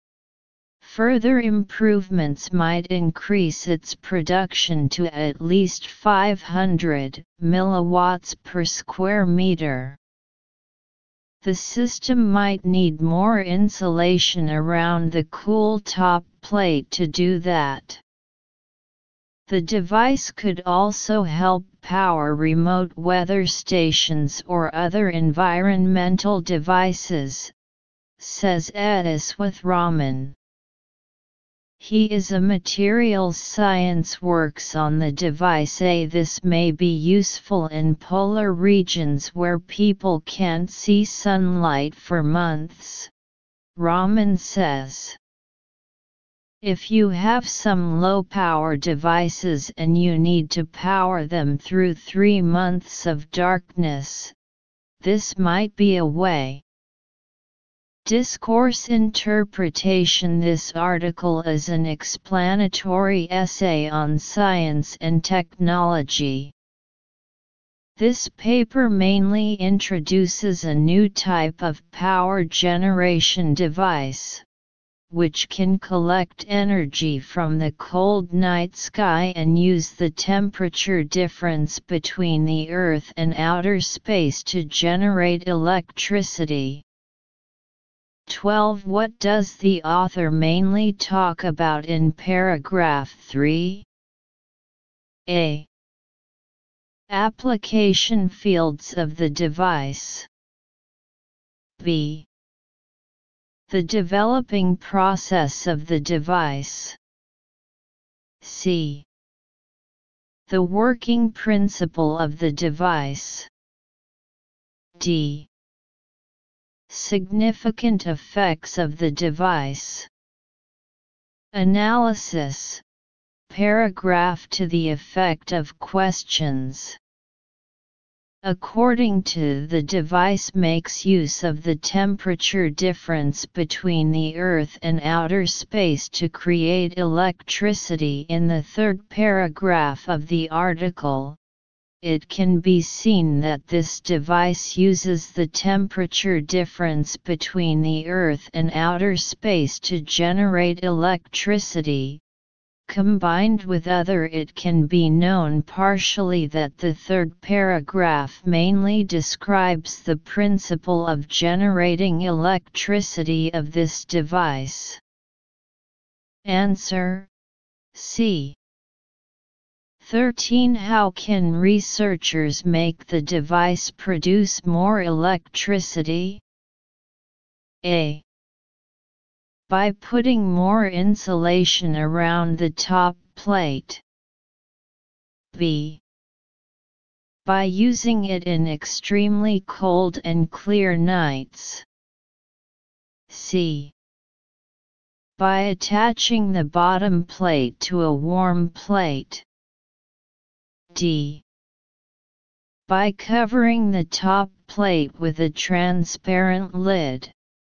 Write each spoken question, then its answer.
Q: How can researchers make the device produce more electricity?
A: Answer A.